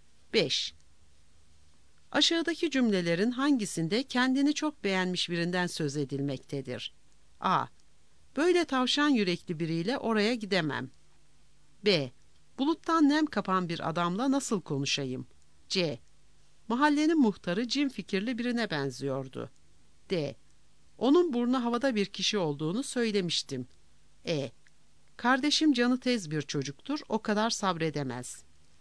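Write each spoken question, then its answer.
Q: Aşağıdaki cümlelerin hangisinde kendini çok beğenmiş birinden söz edilmektedir?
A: D: Onun burnu havada bir kişi olduğunu söylemiştim.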